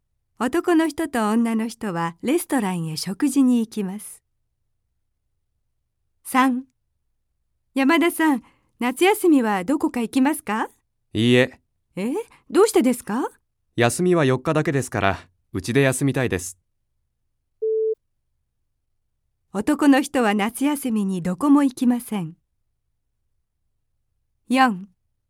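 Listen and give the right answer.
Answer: ○(正しい)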